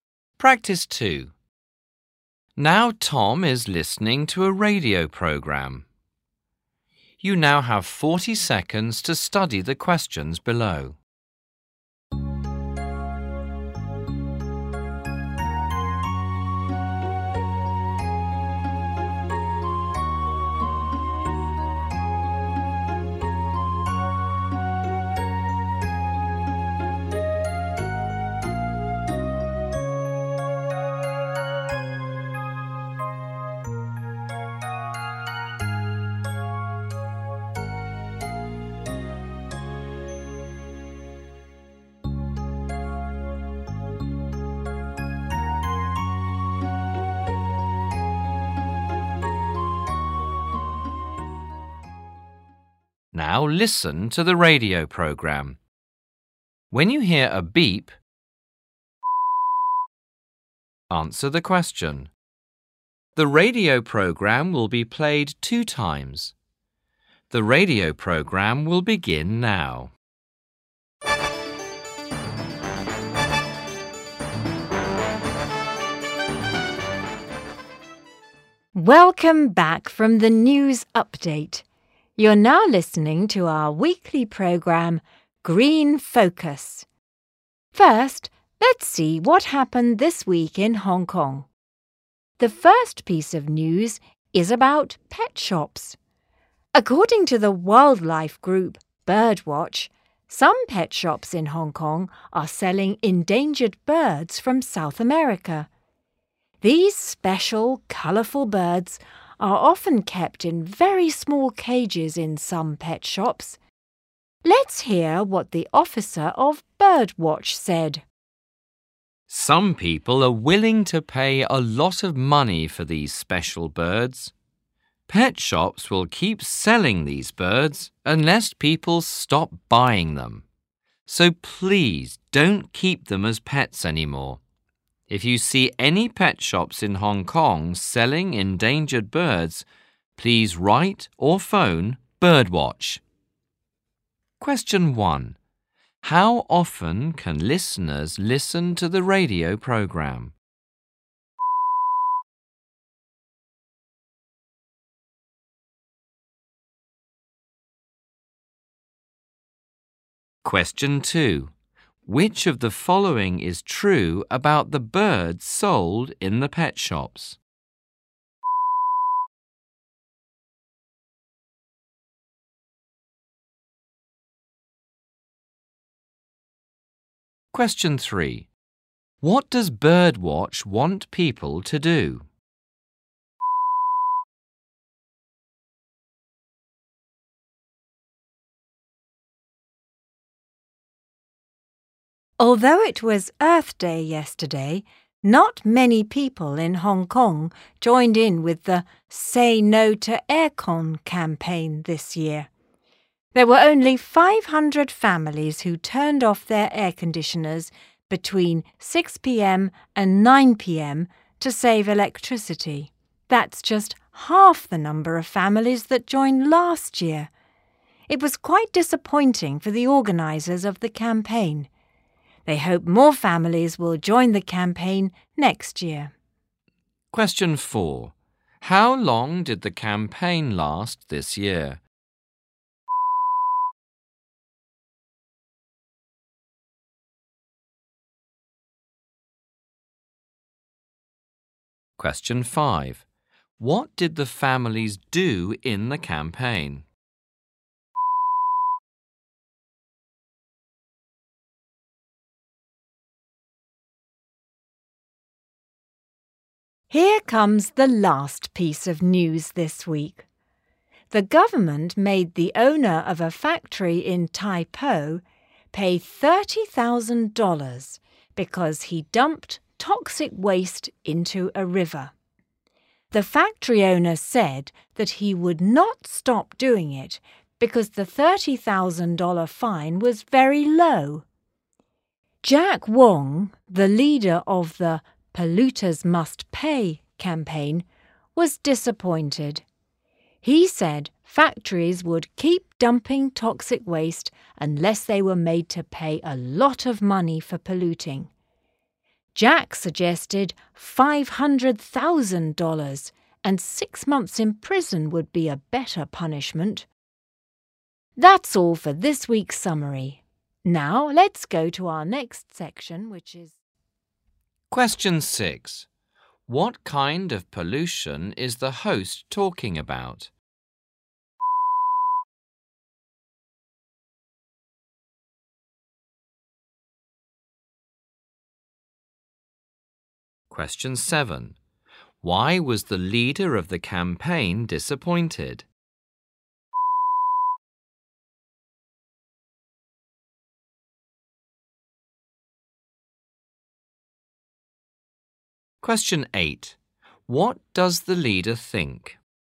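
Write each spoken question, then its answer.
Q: How often can listeners listen to the radio program?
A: Once a week (weekly)

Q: What does Birdwatch want people to do?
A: Stop buying or keeping the birds as pets, and write or phone Birdwatch about pet shops selling them

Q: How long did the campaign last this year?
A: 3 hours (6 p.m. to 9 p.m.)

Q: What did the families do in the campaign?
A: They turned off their air conditioners to save electricity

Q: What kind of pollution is the host talking about?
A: Water pollution (toxic waste dumped into a river)

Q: Why was the leader of the campaign disappointed?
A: The $30,000 fine was too low, so the factory owner would not stop dumping toxic waste

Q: What does the leader think?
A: Polluters should pay a lot; $500,000 and 6 months in prison would be a better punishment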